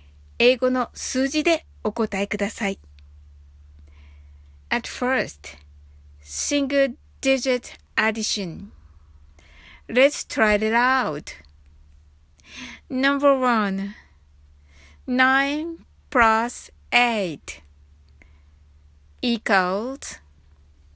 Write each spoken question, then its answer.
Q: nine plus eight equals.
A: The answer is 17.